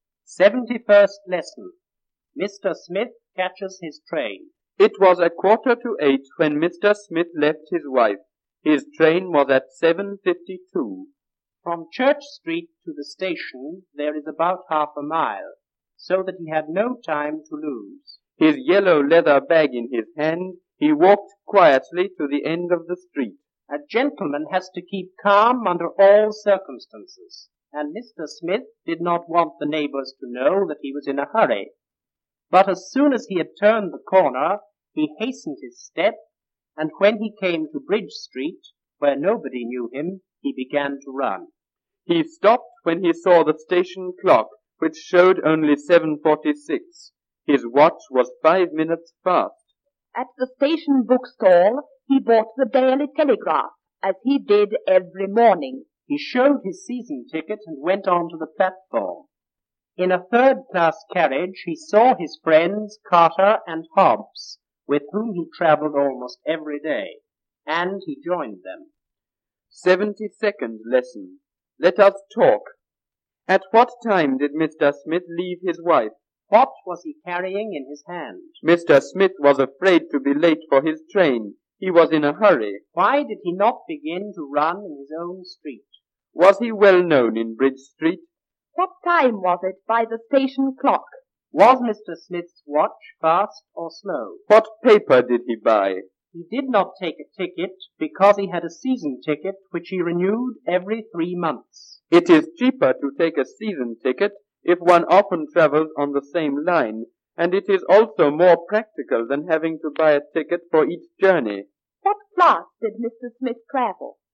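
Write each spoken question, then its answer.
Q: At what time did Mr. Smith leave his wife?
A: At 7:45

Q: What was he carrying in his hand?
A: His yellow leather bag

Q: Why did he not begin to run in his own street?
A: He did not want the neighbors to know he was in a hurry

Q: Was he well known in Bridge Street?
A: No, nobody knew him there

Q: What time was it by the station clock?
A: 7:46

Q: Was Mr. Smith's watch fast or slow?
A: Fast, by 5 minutes

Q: What paper did he buy?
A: The Daily Telegraph

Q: What class did Mr. Smith travel?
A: Third class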